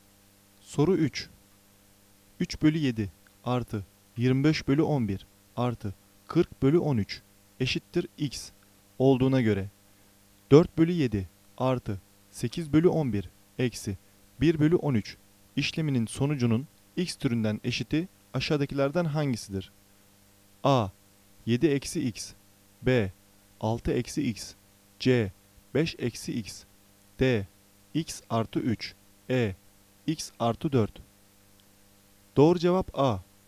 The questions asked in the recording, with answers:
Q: 3 bölü 7 artı 25 bölü 11 artı 40 bölü 13 eşittir x olduğuna göre 4 bölü 7 artı 8 bölü 11 eksi 1 bölü 13 işleminin sonucunun x türünden eşiti aşağıdakilerden hangisidir?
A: Doğru cevap A. 7 eksi x.